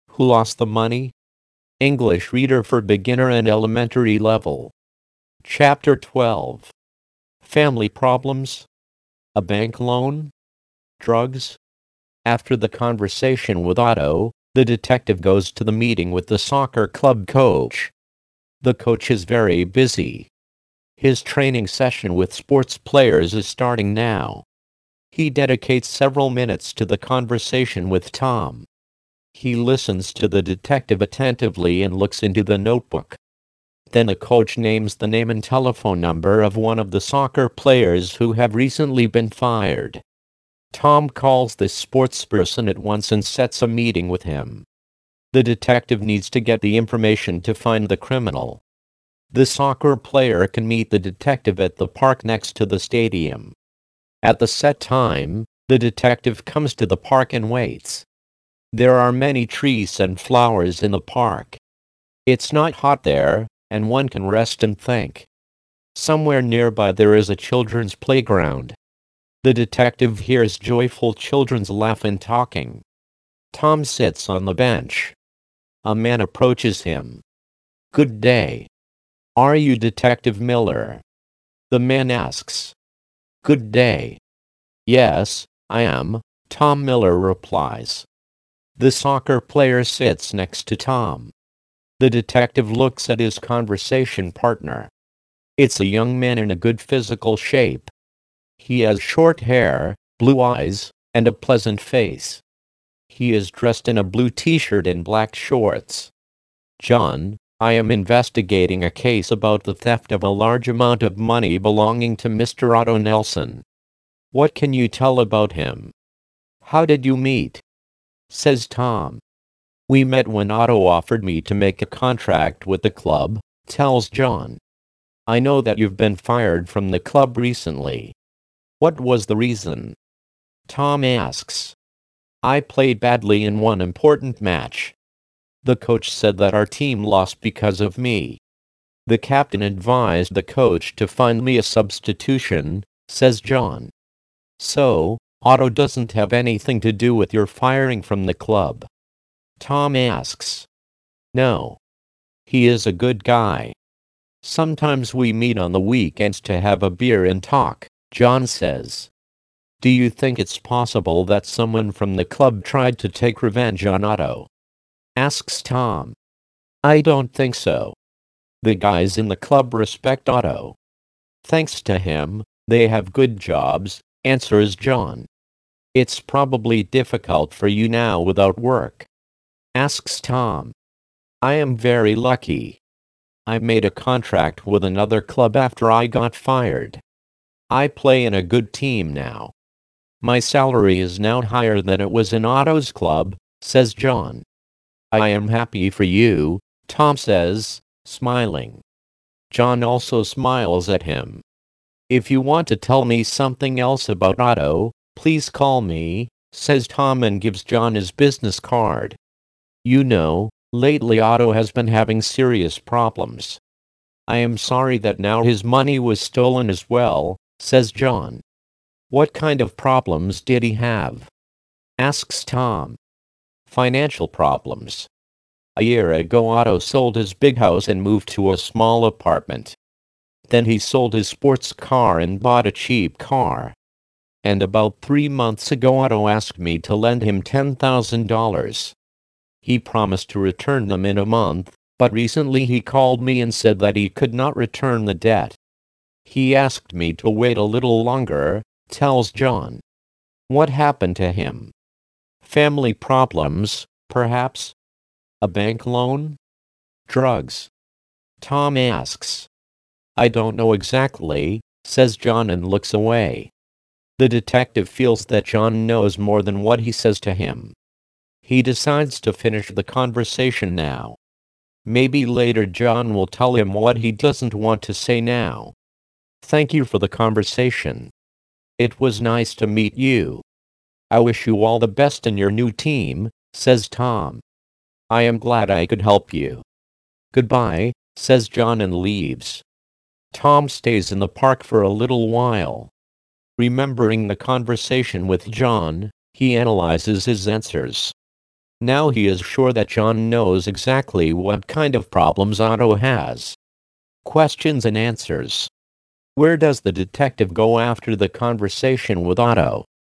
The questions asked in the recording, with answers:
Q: Where does the detective go after the conversation with Otto?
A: The detective goes to the meeting with the soccer club coach.